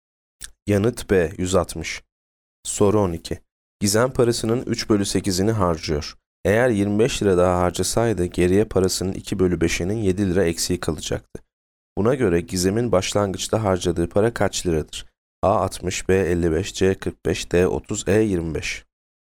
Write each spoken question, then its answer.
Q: Buna göre Gizem'in başlangıçta harcadığı para kaç liradır?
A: Yanıt D 30.